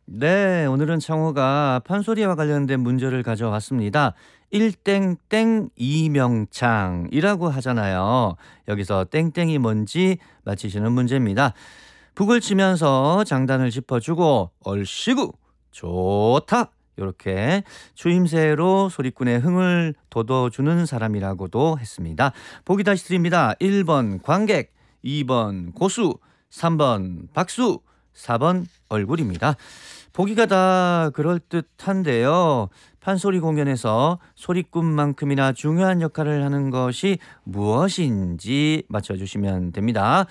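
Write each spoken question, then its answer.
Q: 일땡땡 이명창이라고 하잖아요. 여기서 땡땡이 뭔지 맞히시는 문제입니다.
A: 2: 고수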